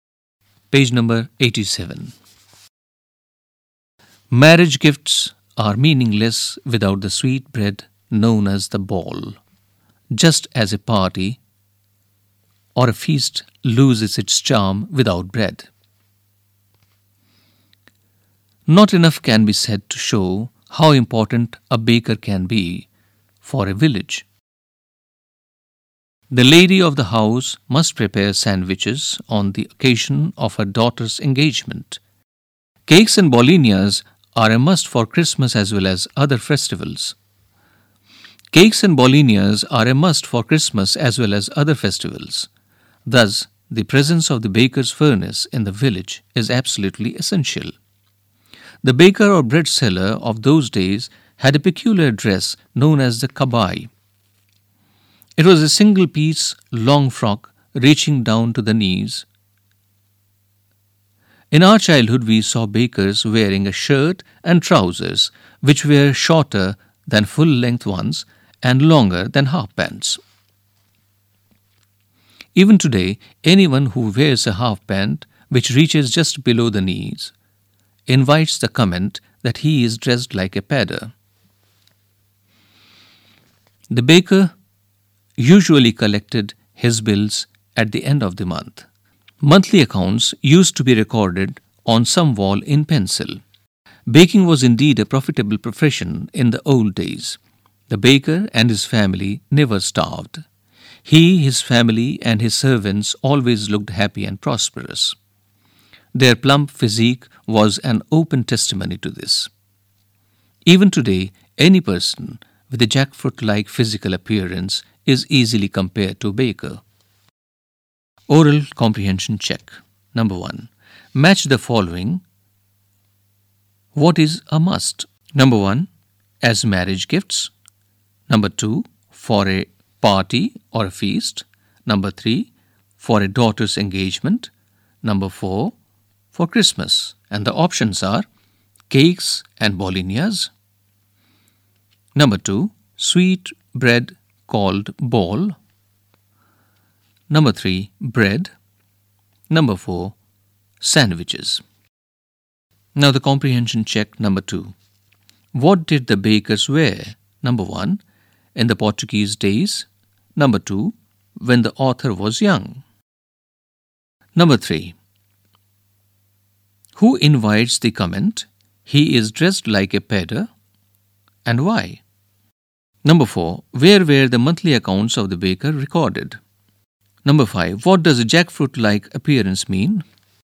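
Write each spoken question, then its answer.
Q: in the Portuguese days.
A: A single-piece long frock reaching down to the knees (kabai)

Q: when the author was young.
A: A shirt and trousers longer than half pants but shorter than full-length

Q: who invites the comment?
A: Anyone who wears a half pant that reaches just below the knees

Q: Where were the monthly accounts of the baker recorded?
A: On a wall, in pencil

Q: What does a jackfruit-like appearance mean?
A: A plump body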